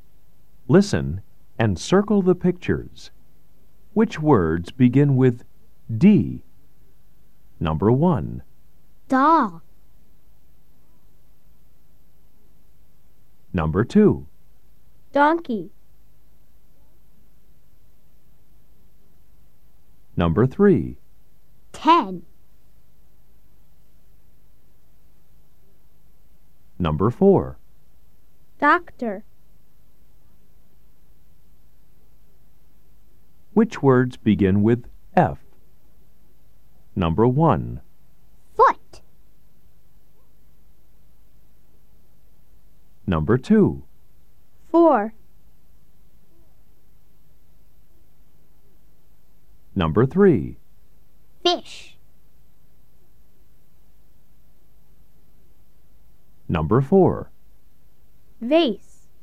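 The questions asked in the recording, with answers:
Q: Which words begin with D?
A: Yes (doll)

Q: Which words begin with D?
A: Yes (donkey)

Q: Which words begin with D?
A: No (ten)

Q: Which words begin with D?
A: Yes (doctor)

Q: Which words begin with F?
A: Yes (foot)

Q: Which words begin with F?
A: Yes (four)

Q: Which words begin with F?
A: Yes (fish)

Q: Which words begin with F?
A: No (vase)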